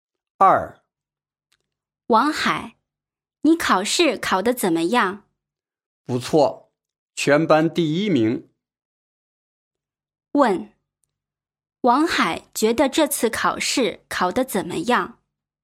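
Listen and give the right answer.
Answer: 不错,全班第一名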